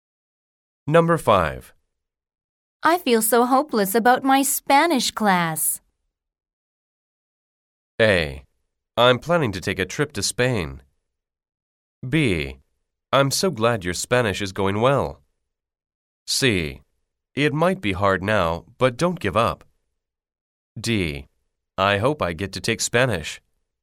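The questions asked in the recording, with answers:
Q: I feel so hopeless about my Spanish class.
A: C: It might be hard now, but don't give up.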